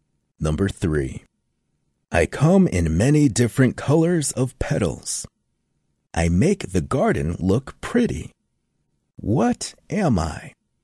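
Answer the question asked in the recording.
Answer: a flower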